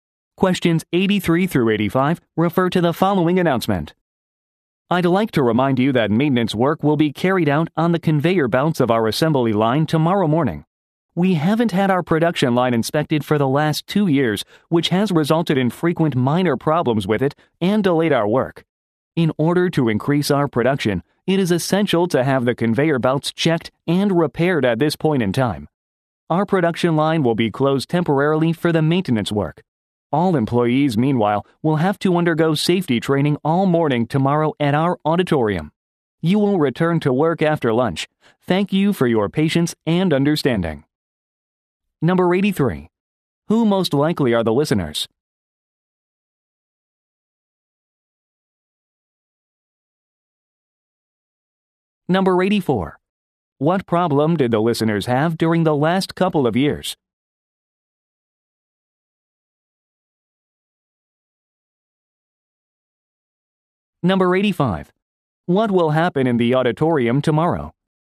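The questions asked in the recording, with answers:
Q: Who most likely are the listeners?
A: Factory assembly line workers

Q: What problem did the listeners have during the last couple of years?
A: Frequent minor problems with the production line delayed work

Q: What will happen in the auditorium tomorrow?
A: Safety training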